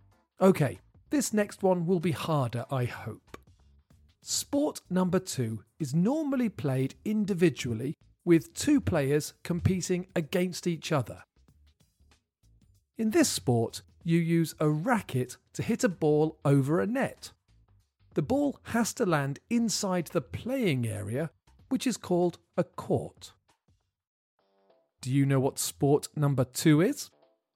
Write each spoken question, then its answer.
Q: Do you know what sport number two is?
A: The answer is tennis.